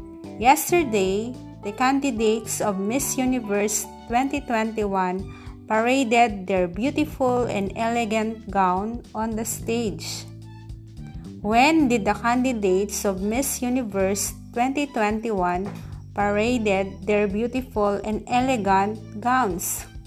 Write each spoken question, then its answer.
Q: When did the candidates of Miss Universe 2021 paraded their beautiful and elegant gowns?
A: Yesterday.